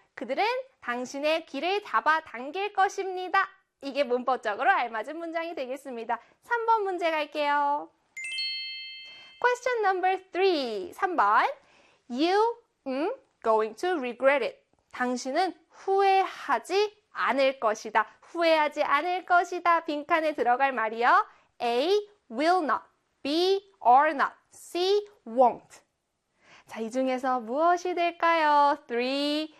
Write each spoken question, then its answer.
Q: 빈칸에 들어갈 말이요. A. Will not. B. Are not. C. Won't. 자, 이 중에서 무엇이 될까요?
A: 정답은요? 그렇죠. B에 are not 비동사 들어가야 되지요.